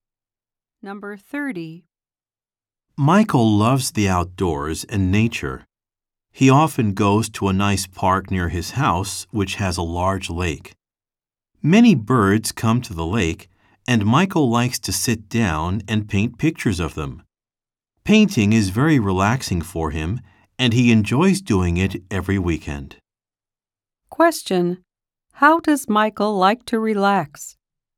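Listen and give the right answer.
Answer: By painting pictures of birds at the lake.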